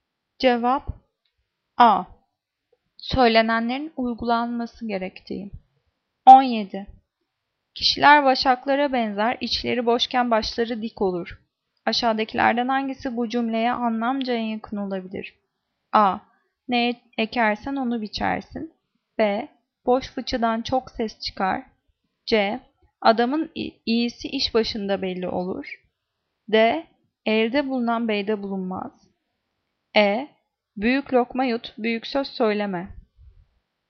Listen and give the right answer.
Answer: Cevap B. Boş fıçıdan çok ses çıkar.